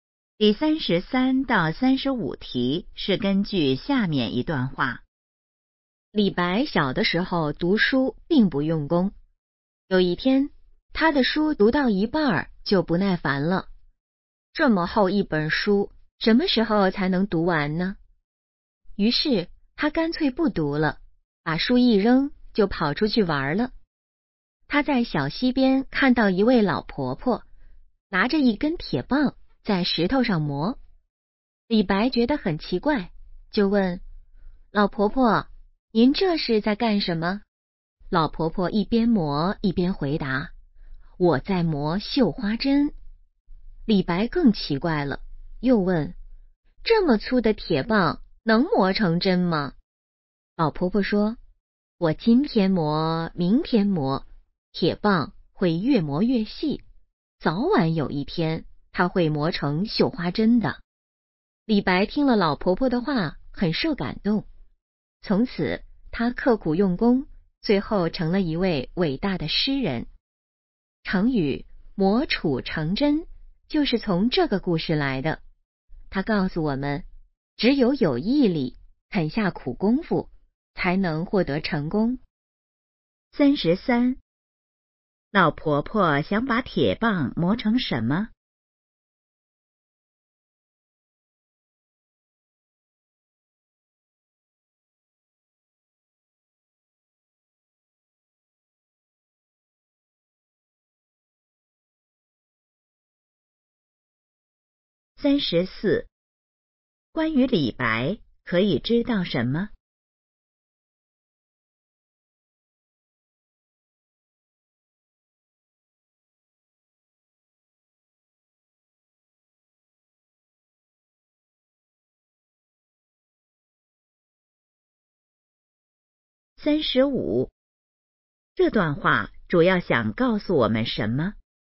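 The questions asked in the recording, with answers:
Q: 老婆婆想把铁棒磨成什么?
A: 绣花针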